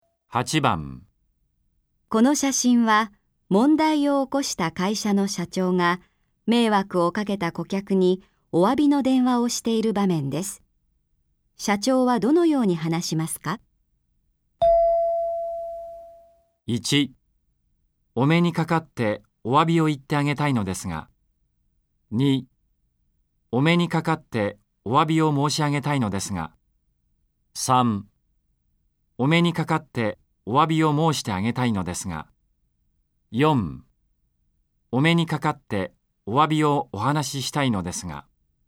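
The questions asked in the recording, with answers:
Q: 社長はどのように話しますか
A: 2: お目にかかってお詫びを申し上げたいのですが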